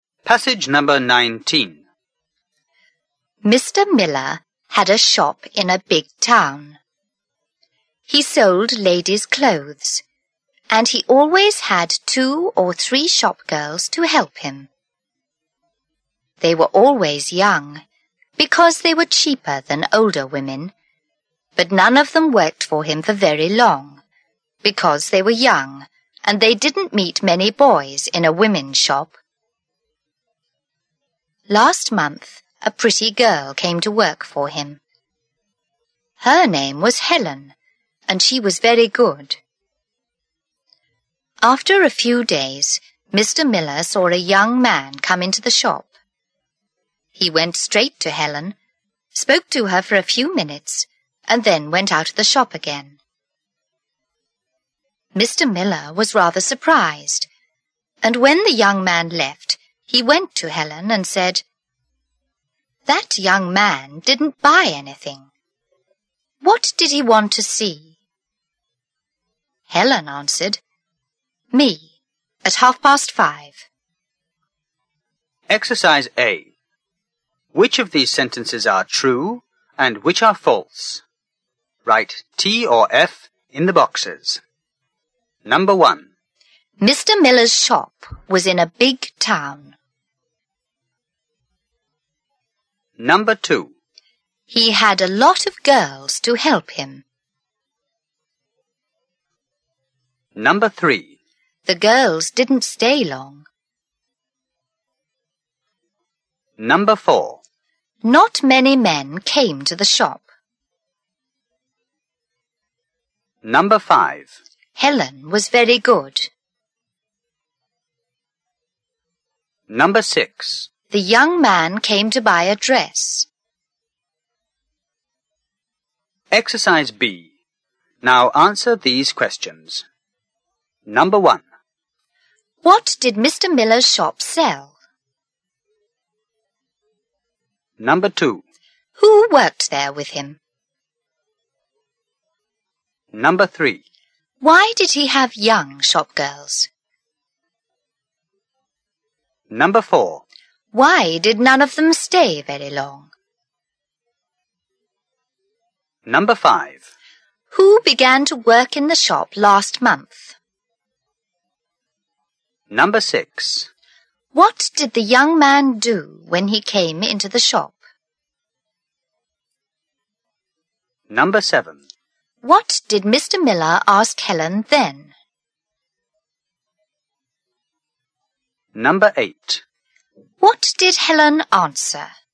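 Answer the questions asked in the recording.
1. True
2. False
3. True
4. True
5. True
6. False
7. Ladies' clothes
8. Two or three young shop girls
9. They were cheaper than older women
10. They didn't meet many boys in a women's shop
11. A pretty girl named Helen
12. He went straight to Helen, spoke to her for a few minutes and left
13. What the young man wanted to see, since he didn't buy anything
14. "Me, at 5:30."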